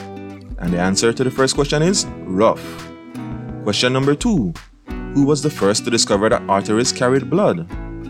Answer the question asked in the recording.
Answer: And the question is Galen.